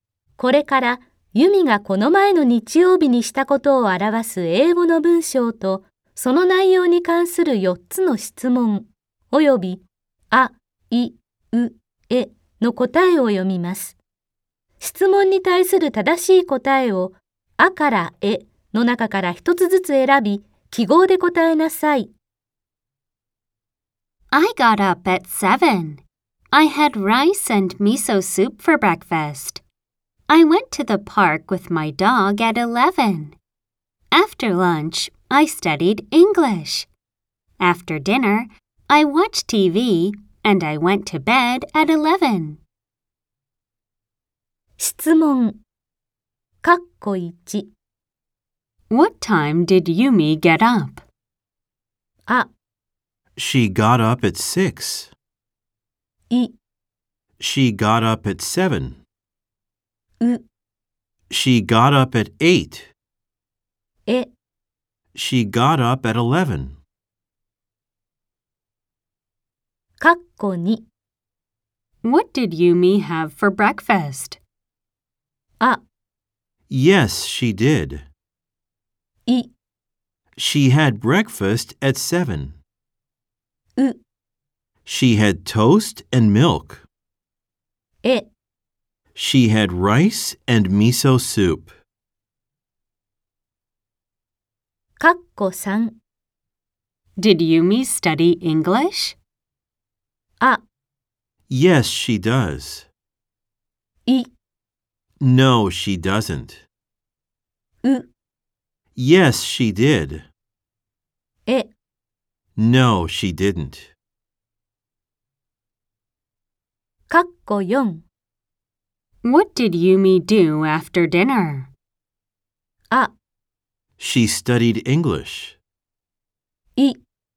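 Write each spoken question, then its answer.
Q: What time did Yumi get up?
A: い: She got up at 7.

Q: What did Yumi have for breakfast?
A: え: She had rice and miso soup.

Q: Did Yumi study English?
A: う: Yes, she did.

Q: What did Yumi do after dinner?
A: い: She watched TV.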